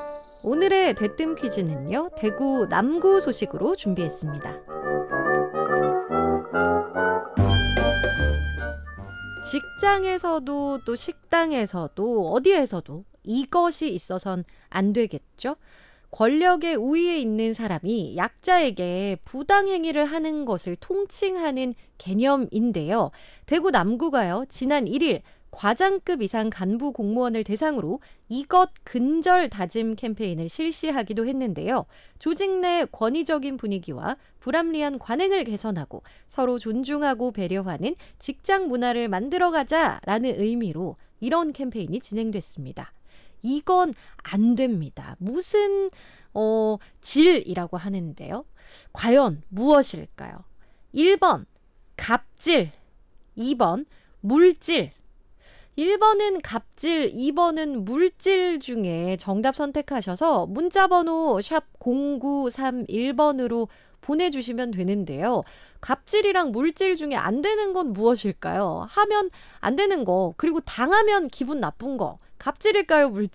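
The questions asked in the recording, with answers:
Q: 이건 안 됩니다. 무슨 질이라고 하는데요. 과연 무엇일까요?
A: 1: 갑질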